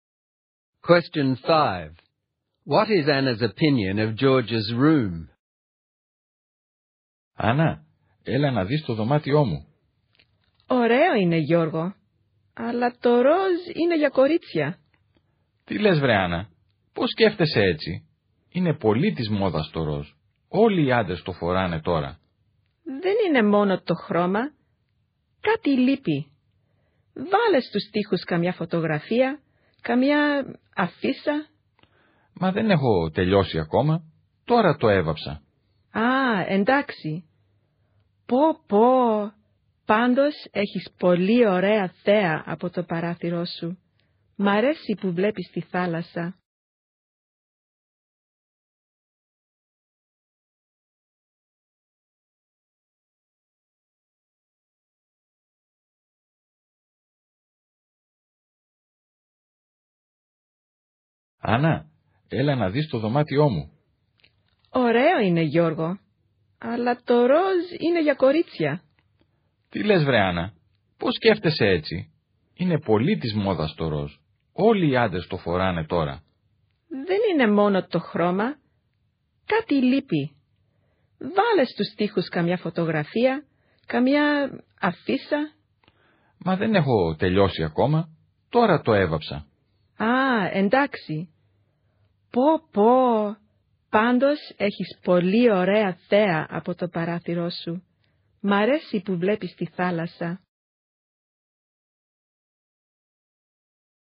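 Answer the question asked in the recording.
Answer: She thinks pink is for girls and something is missing, such as photos or posters on the walls, but she likes the sea view from the window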